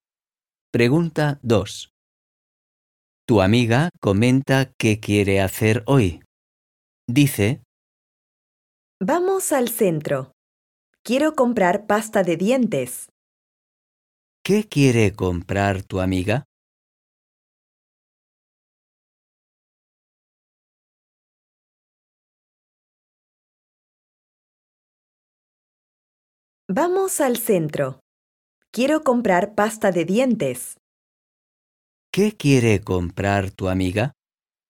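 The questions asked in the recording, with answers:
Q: ¿Qué quiere comprar tu amiga?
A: Pasta de dientes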